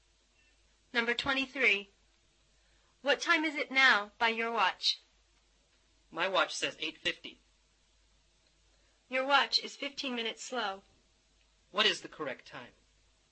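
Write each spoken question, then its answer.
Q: What is the correct time?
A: 9:05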